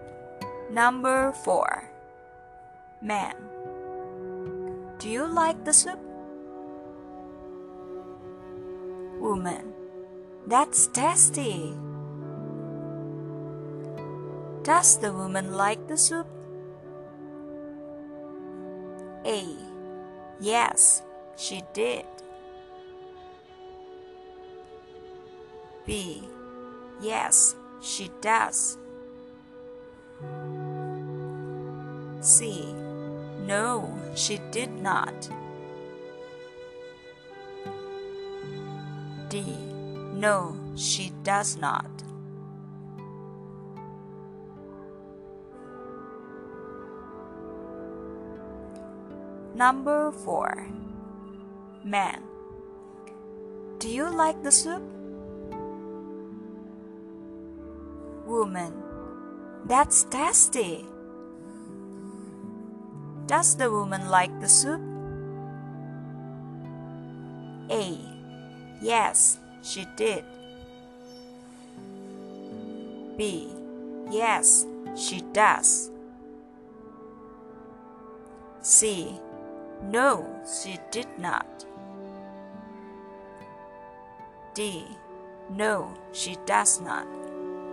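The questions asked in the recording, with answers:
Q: Does the woman like the soup?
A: B: Yes, she does.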